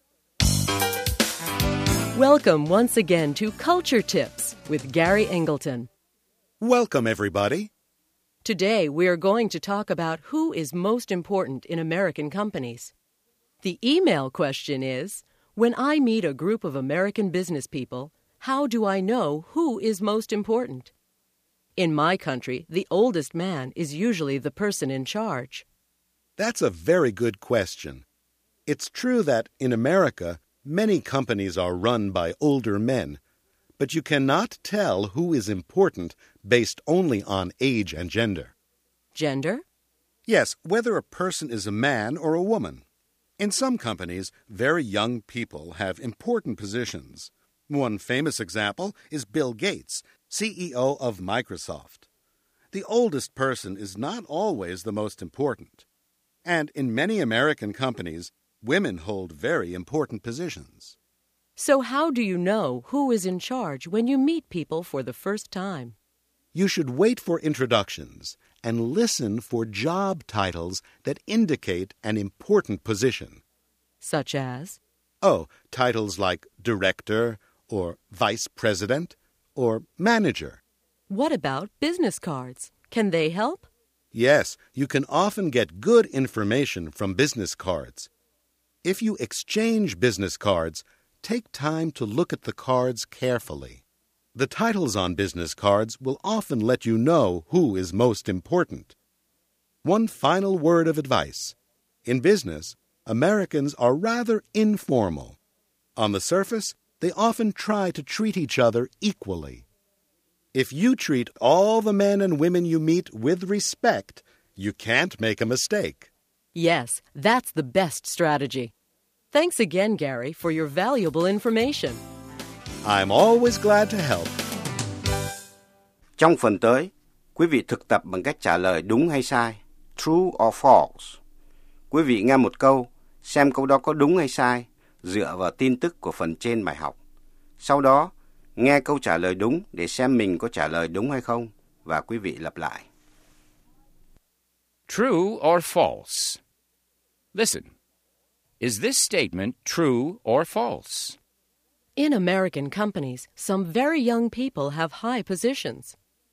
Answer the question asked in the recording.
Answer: True. Young people sometimes have high positions in American companies.